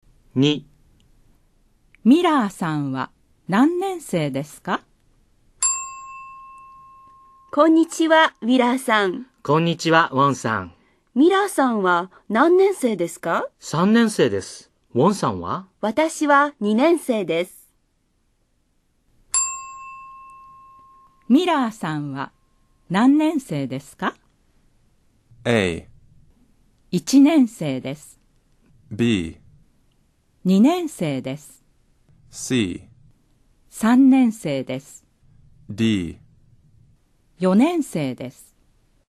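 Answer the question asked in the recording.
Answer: C: 3年生です。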